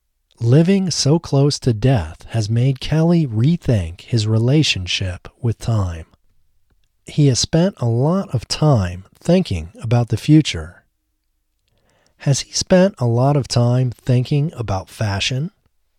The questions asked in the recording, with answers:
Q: Has he spent a lot of time thinking about fashion?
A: No, he hasn't spent a lot of time thinking about fashion.